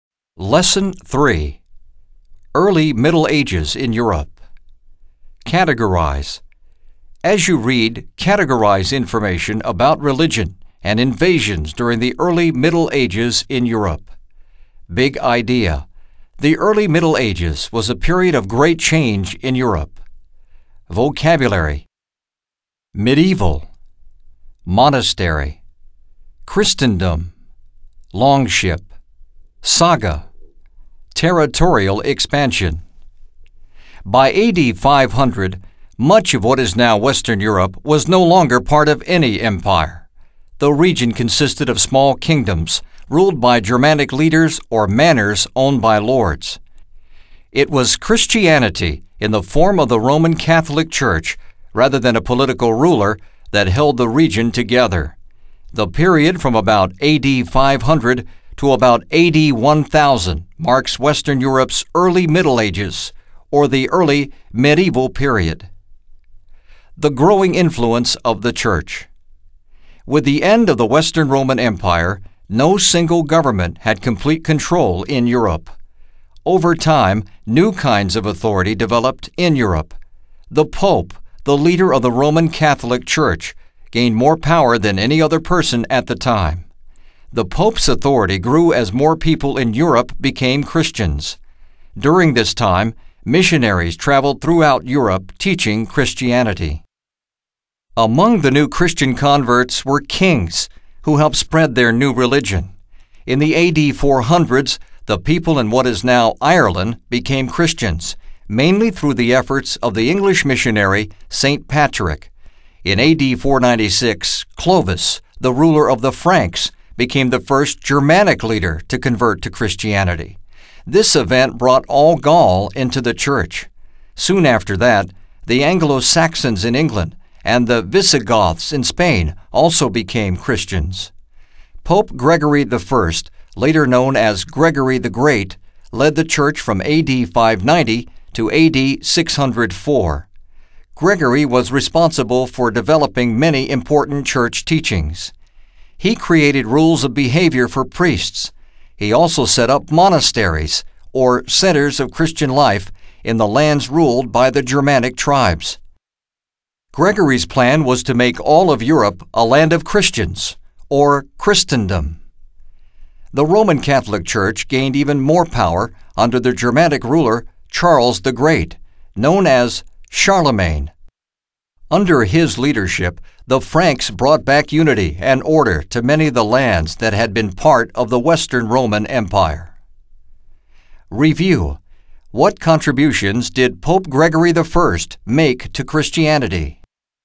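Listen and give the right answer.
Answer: He developed important church teachings, created rules of behavior for priests, and set up monasteries in Germanic lands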